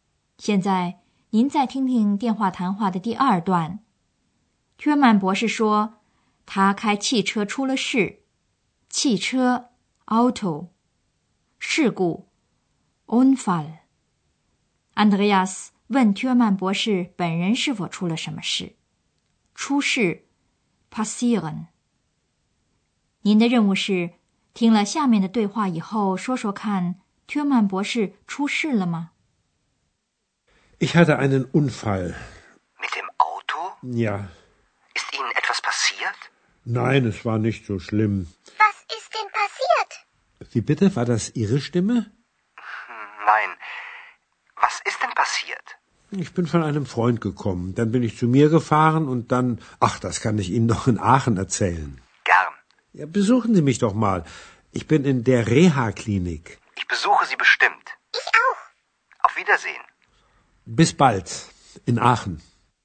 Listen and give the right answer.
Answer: 现在我们知道了,至少薛曼博士本人没有发生什么严重的事情。